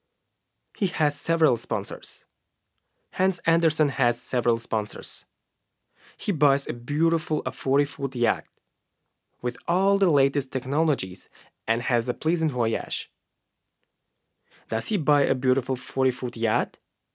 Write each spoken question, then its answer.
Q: Does he buy a beautiful 40-foot yacht?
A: Yes, he buys a beautiful 40-foot yacht.